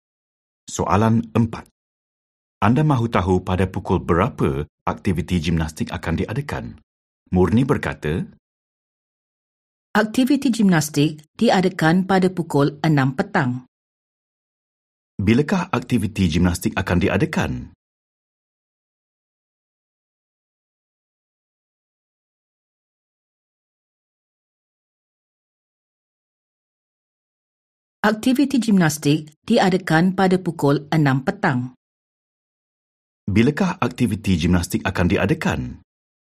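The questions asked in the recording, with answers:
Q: Bilakah aktiviti gimnastik akan diadakan?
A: pukul 6 petang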